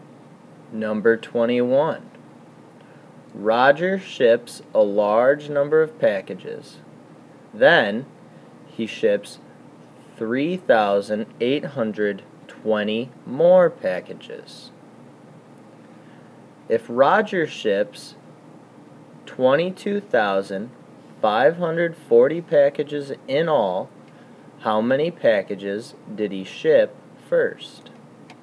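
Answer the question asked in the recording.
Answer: 18,720 packages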